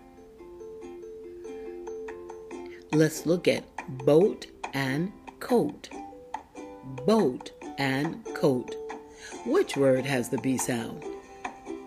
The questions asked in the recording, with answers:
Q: Which word has the B sound?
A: You are amazing. Boat does have the B sound.